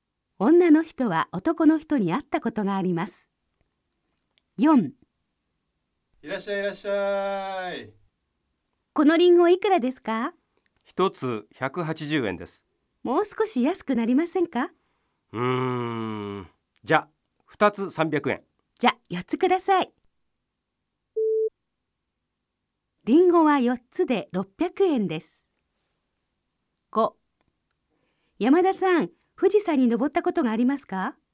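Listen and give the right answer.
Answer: 正しい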